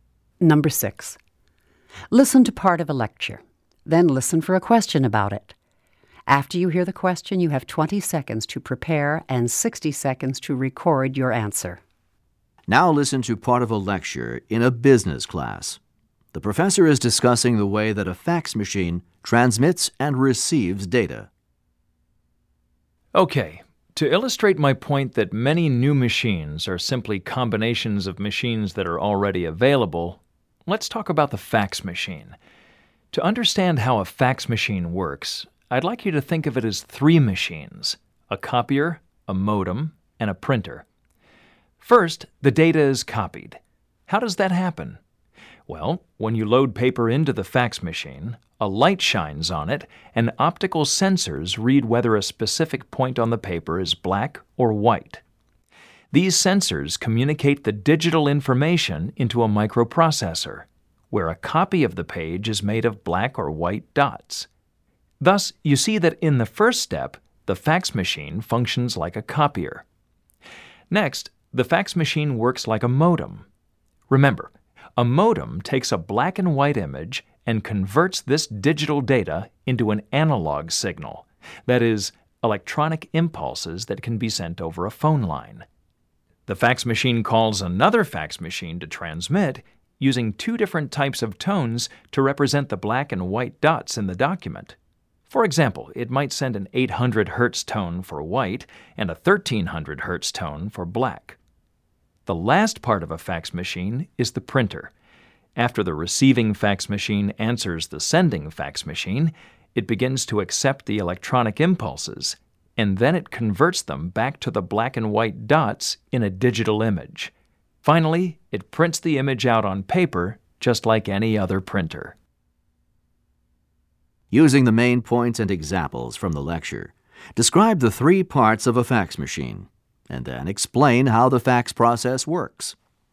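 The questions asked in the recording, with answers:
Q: Using the main points and examples from the lecture, describe the three parts of a fax machine, and then explain how the fax process works.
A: Copier, modem and printer: sensors read the page as black and white dots, a modem sends these as tones over the phone line, and the receiving machine turns them back into dots and prints the page.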